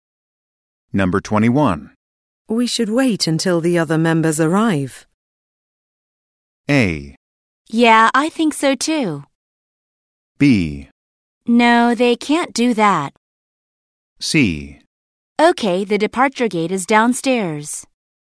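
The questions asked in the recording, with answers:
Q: We should wait until the other members arrive.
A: A: Yeah, I think so too.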